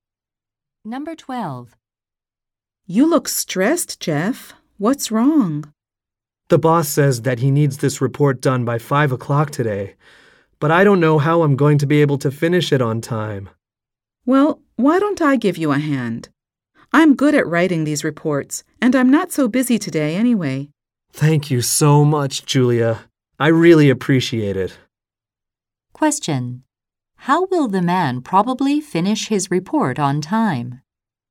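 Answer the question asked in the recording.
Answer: Julia will help him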